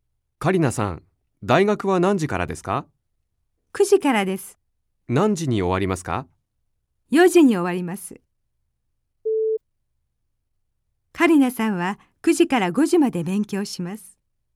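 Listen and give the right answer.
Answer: ×(4時に終わります)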